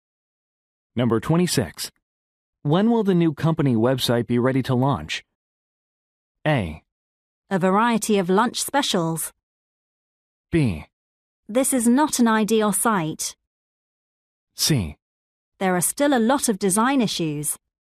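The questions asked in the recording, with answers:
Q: When will the new company website be ready to launch?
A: C: There are still a lot of design issues.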